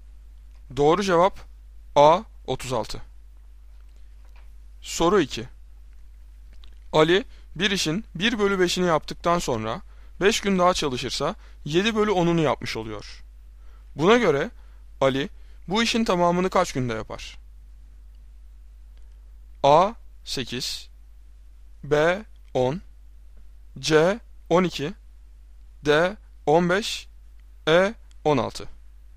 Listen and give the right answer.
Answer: Doğru cevap B 10.